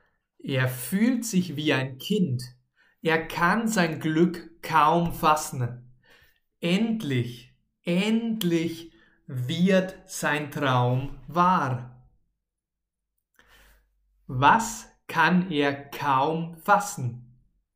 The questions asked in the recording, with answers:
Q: Was kann er kaum fassen?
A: Sein Glück, er kann sein Glück kaum fassen.